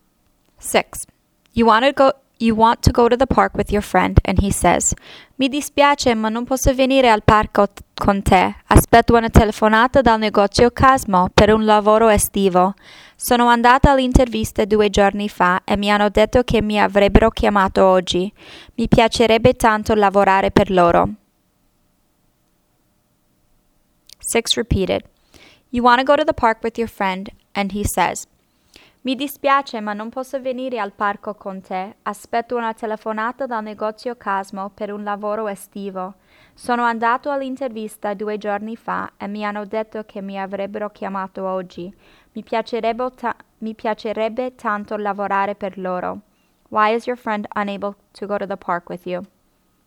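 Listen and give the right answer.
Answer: He is waiting for a phone call about a summer job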